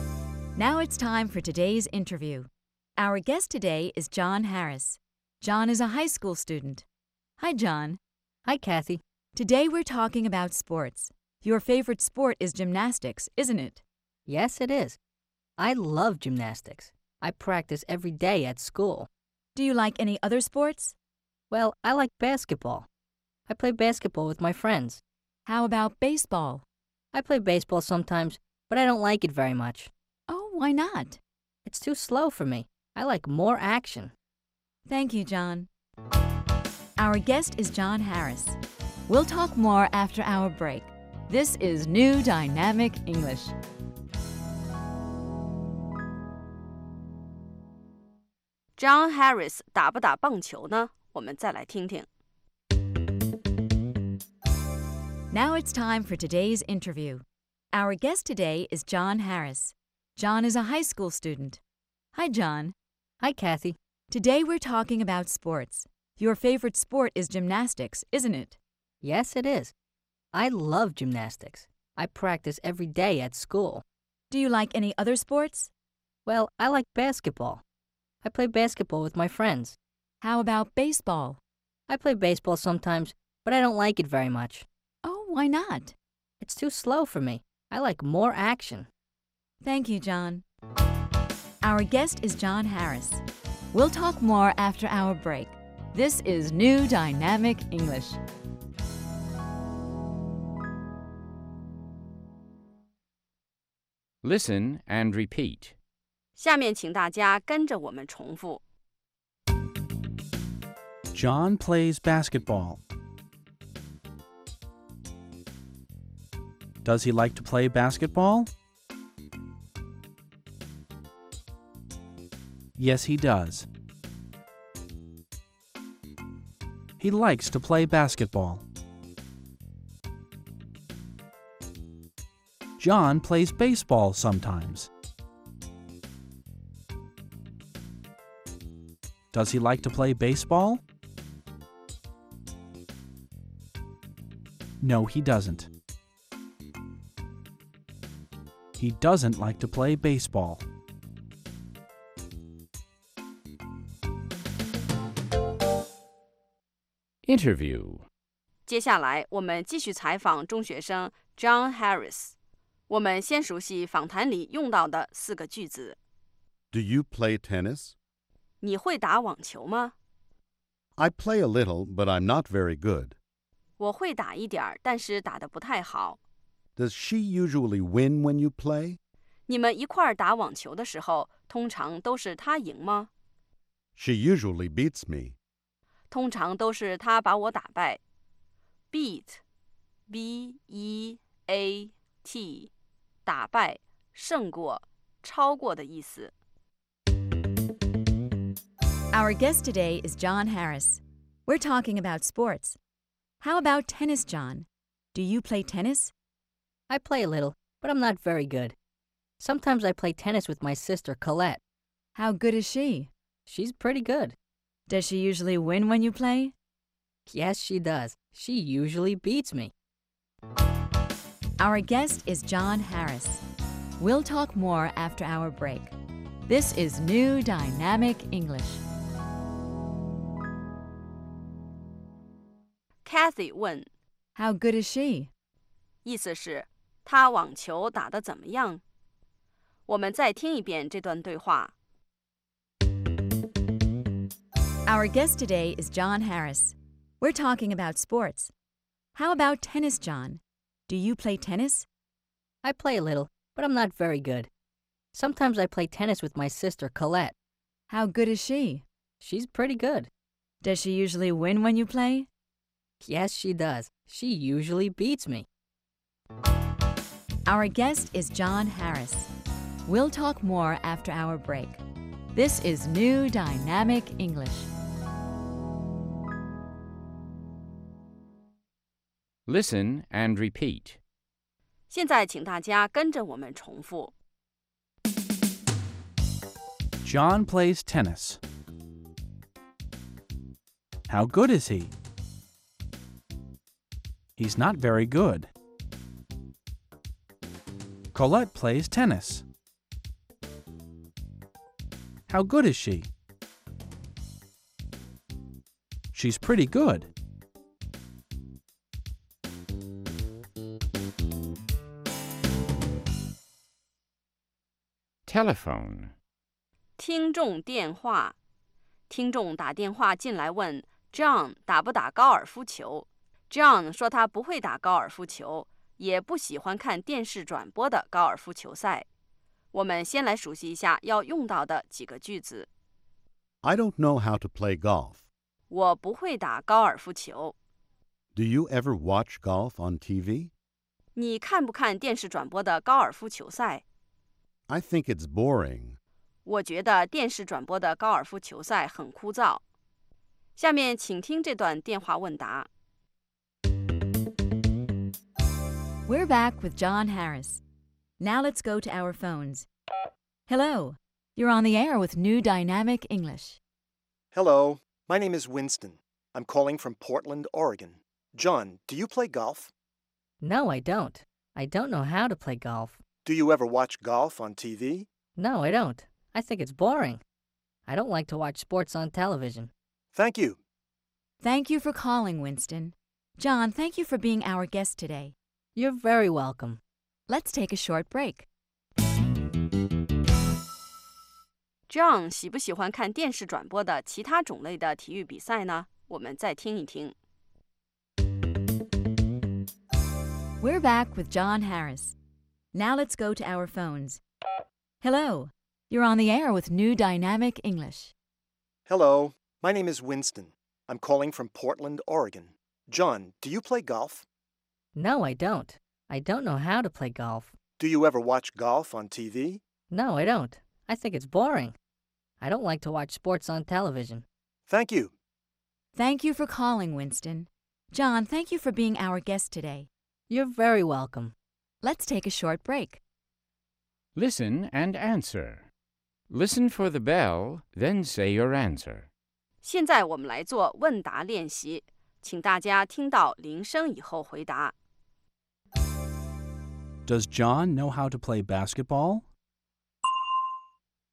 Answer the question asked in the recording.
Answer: Yes, he does. He knows how to play basketball.